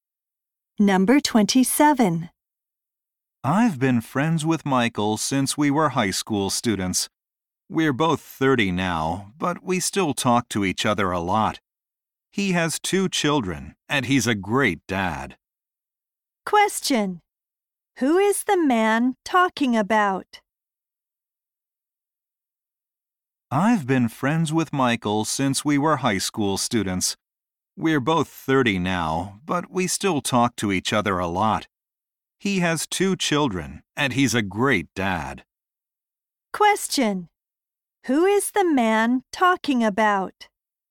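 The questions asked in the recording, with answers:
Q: Who is the man talking about?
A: His friend from high school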